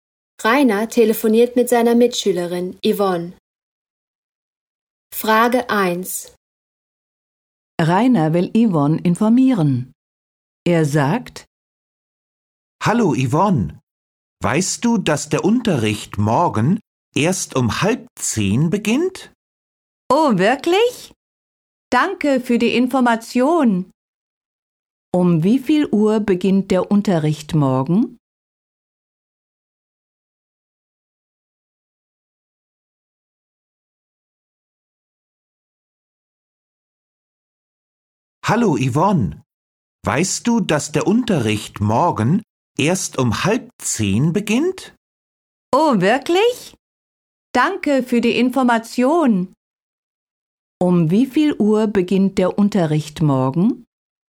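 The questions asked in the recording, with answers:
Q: Um wie viel Uhr beginnt der Unterricht morgen?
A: Um 9:30 Uhr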